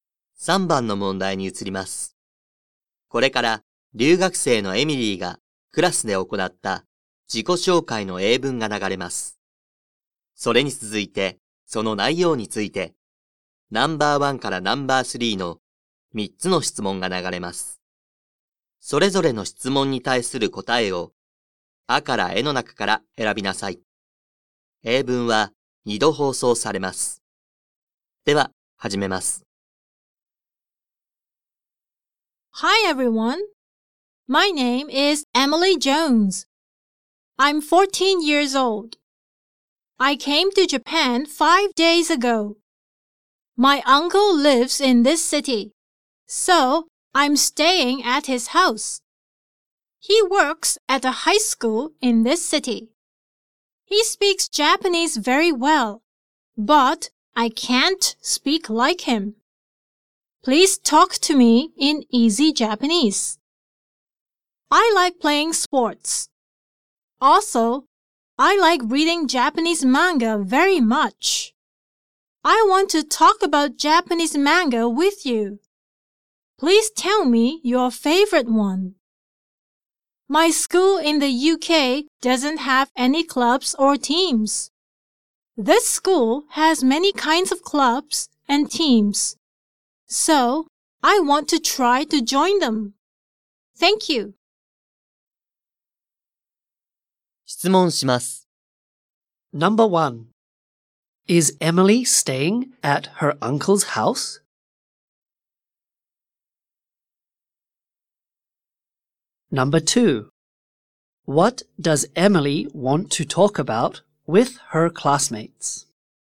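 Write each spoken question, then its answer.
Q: Is Emily staying at her uncle's house?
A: Yes, she is.

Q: What does Emily want to talk about with her classmates?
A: Japanese manga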